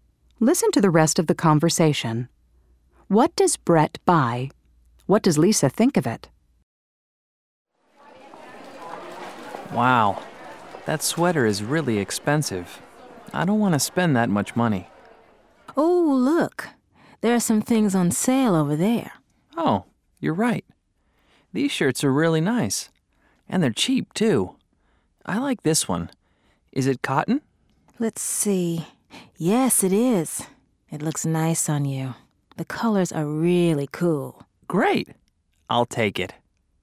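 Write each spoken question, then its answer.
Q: What does Brett buy?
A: A cotton shirt on sale

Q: What does Lisa think of it?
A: It looks nice on him; the colors are really cool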